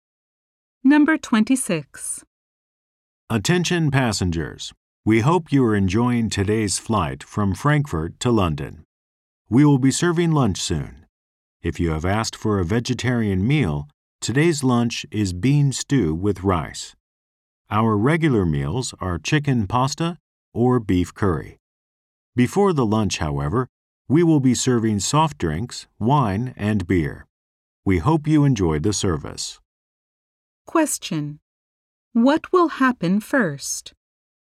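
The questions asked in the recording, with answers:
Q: What will happen first?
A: Drinks will be served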